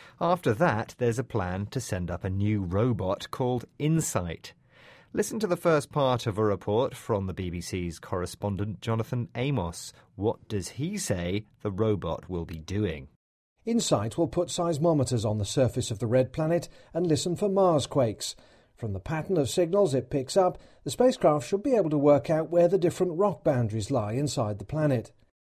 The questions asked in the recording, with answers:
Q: What does he say the robot will be doing?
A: Yes, the robot will put some seismometers on the surface of Mars.